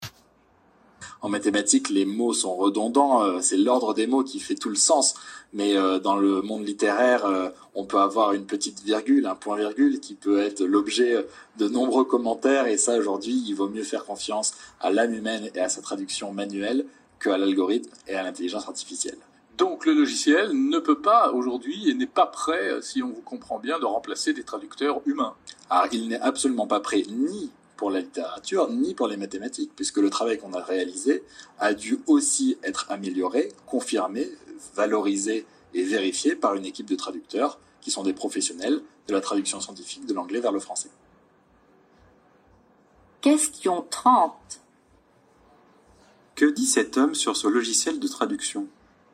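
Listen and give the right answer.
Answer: Il n'est pas prêt à remplacer les traducteurs humains, ni pour la littérature ni pour les mathématiques : son travail a dû être vérifié par des traducteurs professionnels.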